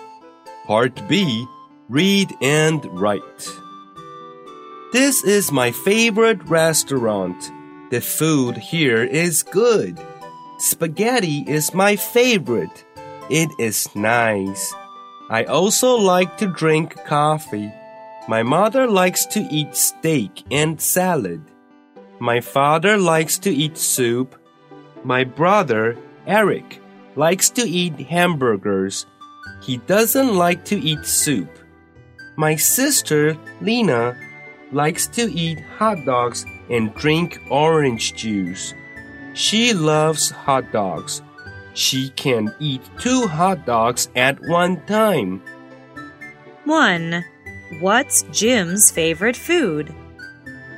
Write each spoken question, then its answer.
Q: What's Jim's favorite food?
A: His favorite food is spaghetti.